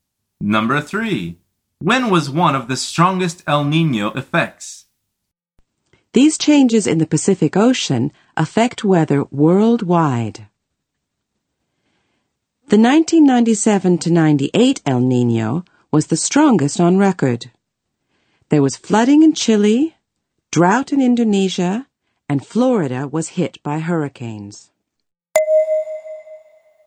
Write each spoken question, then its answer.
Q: When was one of the strongest El Niño effects?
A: The answer is 1997 to 1998.